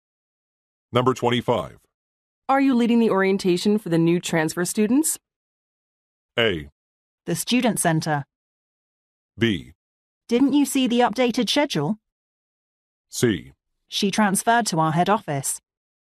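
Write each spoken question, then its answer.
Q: Are you leading the orientation for the new transfer students?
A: B: Didn't you see the updated schedule?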